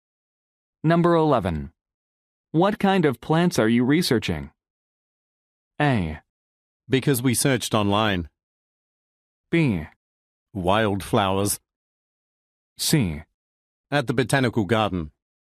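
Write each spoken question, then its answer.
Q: What kind of plants are you researching?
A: B: Wildflowers.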